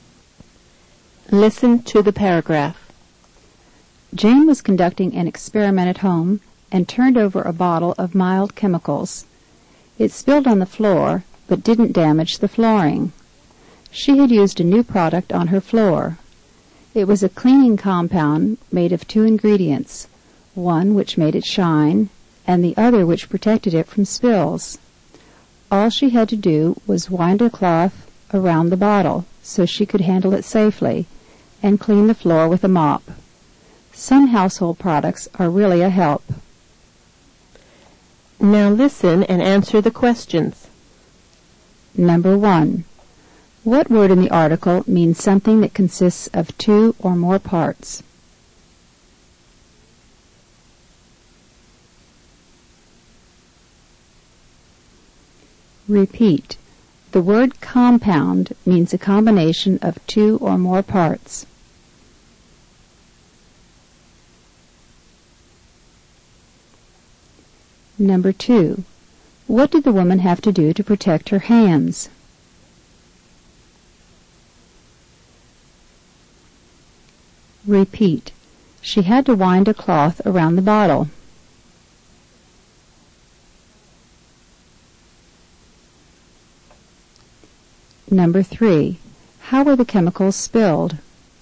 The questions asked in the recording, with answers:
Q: What word in the article means something that consists of two or more parts?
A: The word compound means a combination of two or more parts.

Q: How were the chemicals spilled?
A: The bottle was turned over.